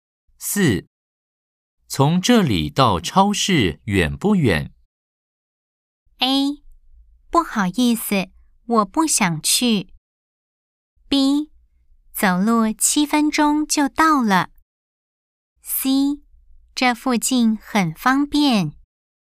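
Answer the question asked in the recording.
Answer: B: 走路七分钟就到了。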